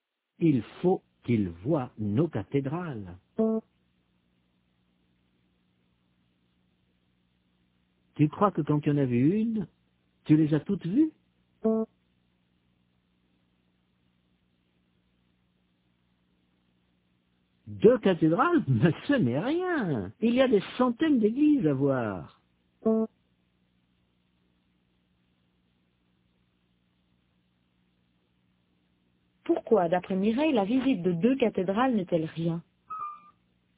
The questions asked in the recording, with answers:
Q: Pourquoi, d'après Mireille, la visite de deux cathédrales n'est-elle rien?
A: Parce qu'il y a des centaines d'églises à voir.